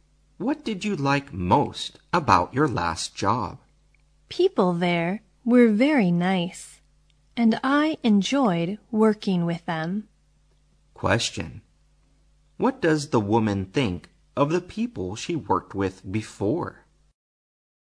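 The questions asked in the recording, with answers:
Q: What does the woman think of the people she worked with before?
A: They were very nice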